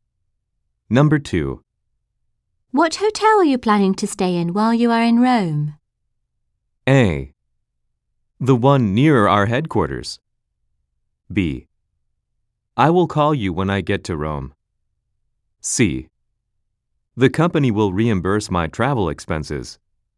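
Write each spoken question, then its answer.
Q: What hotel are you planning to stay in while you are in Rome?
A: A: The one near our headquarters.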